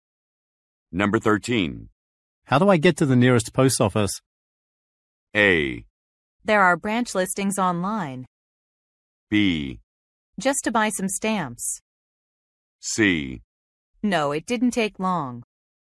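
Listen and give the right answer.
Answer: A: There are branch listings online.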